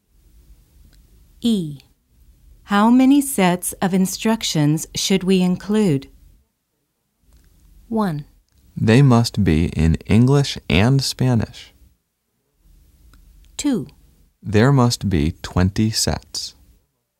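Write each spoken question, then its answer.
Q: How many sets of instructions should we include?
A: 2: There must be 20 sets.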